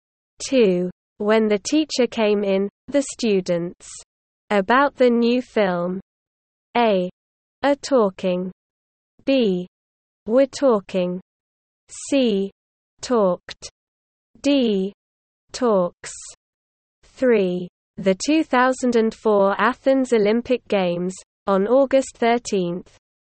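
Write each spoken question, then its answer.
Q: When the teacher came in, the students. About the new film.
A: B: were talking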